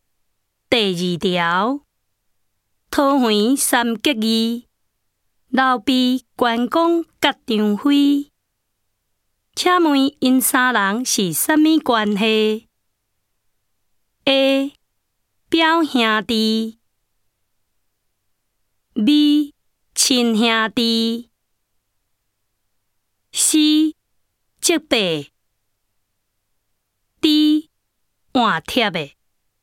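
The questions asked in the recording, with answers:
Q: 请问因三人是什么关系?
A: D: 换帖的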